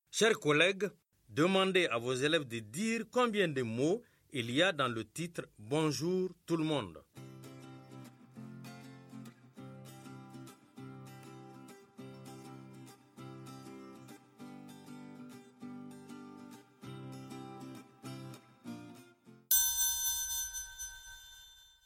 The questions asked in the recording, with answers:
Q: Chers collègues, demandez à vos élèves de dire combien de mots il y a dans le titre « Bonjour tout le monde ».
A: Dans « Bonjour tout le monde », il y a quatre mots.